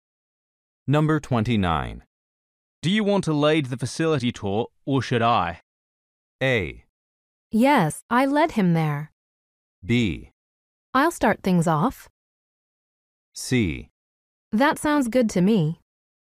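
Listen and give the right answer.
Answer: B: I'll start things off.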